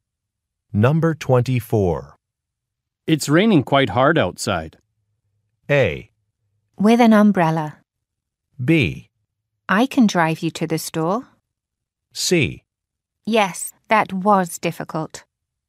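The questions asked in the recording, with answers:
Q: It's raining quite hard outside.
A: B: I can drive you to the store.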